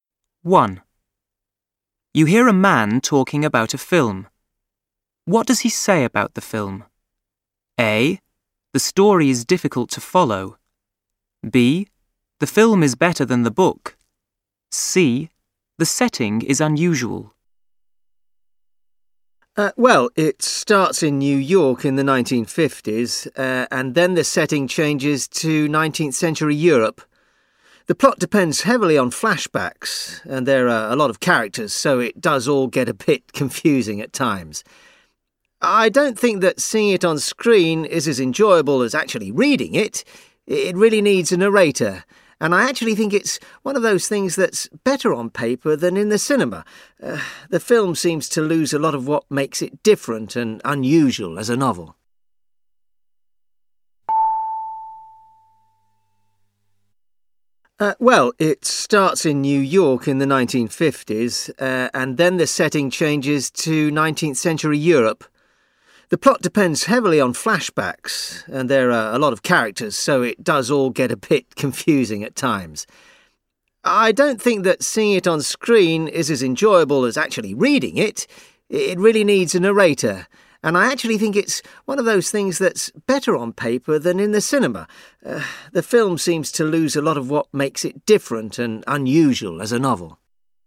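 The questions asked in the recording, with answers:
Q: What does he say about the film?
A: A: The story is difficult to follow.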